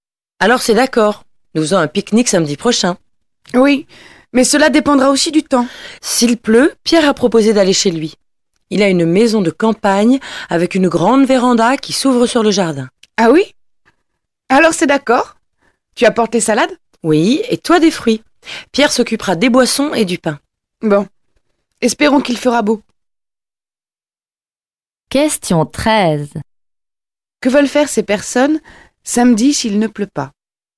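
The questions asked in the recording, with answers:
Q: Que veulent faire ces personnes samedi s'il ne pleut pas ?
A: Faire un pique-nique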